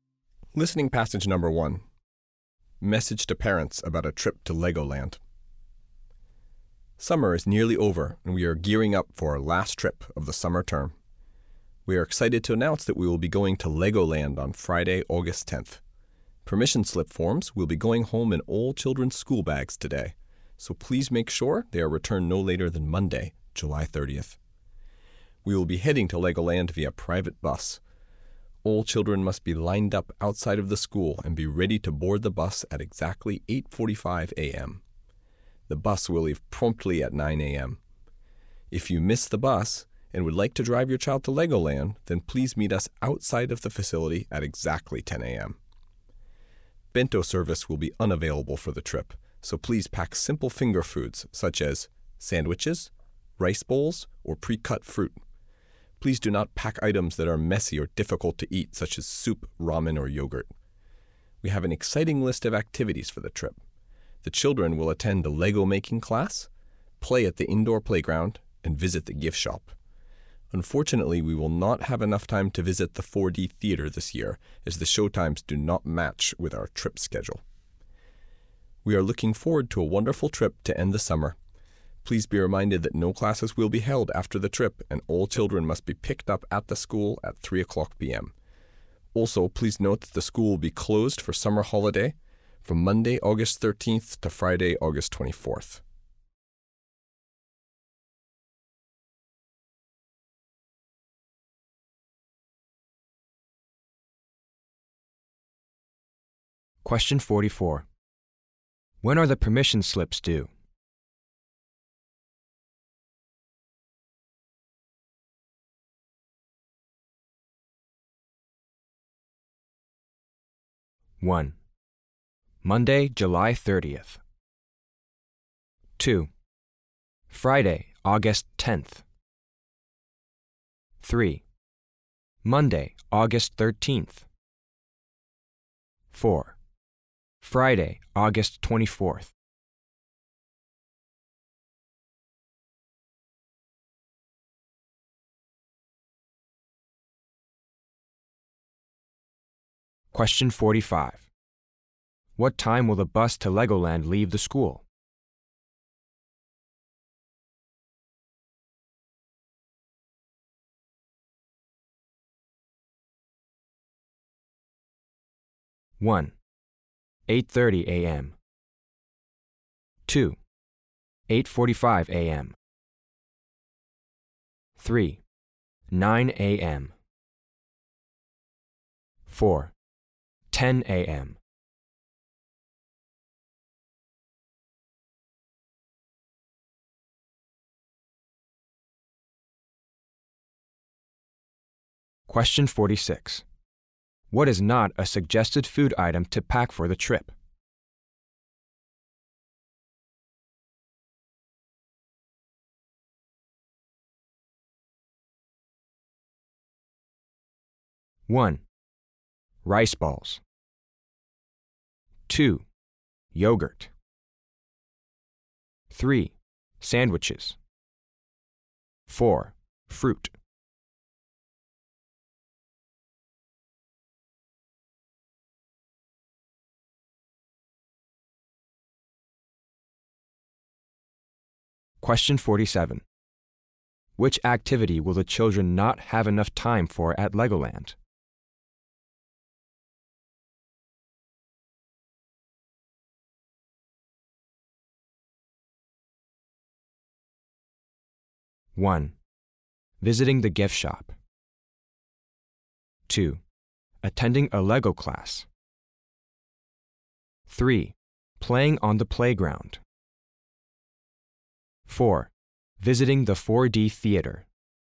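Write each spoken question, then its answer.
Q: When are the permission slips due?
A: 1: Monday, July 30th

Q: What time will the bus to Legoland leave the school?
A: 3: 9 a.m.

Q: What is not a suggested food item to pack for the trip?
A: 2: yogurt

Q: Which activity will the children not have enough time for at Legoland?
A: 4: visiting the 4D theater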